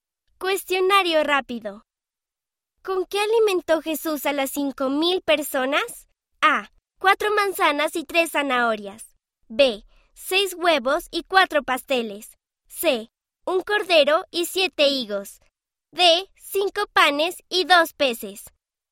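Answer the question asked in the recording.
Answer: D: Cinco panes y dos peces.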